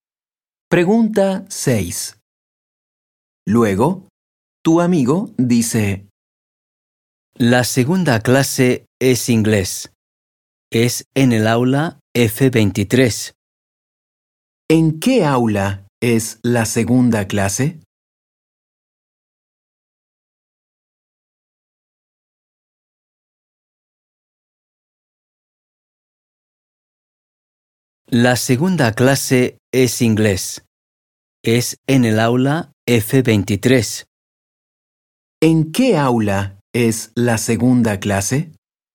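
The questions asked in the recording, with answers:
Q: ¿En qué aula es la segunda clase?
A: En el aula F23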